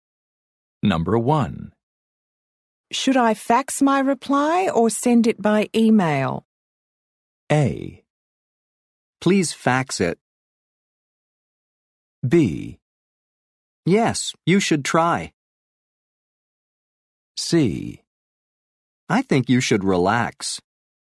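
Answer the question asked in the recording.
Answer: A: Please fax it.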